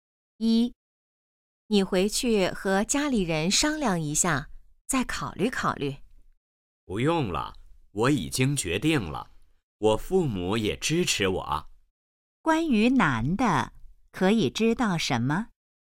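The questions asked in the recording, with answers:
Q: 关于男的,可以知道什么?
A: 他已经做了决定,父母也支持他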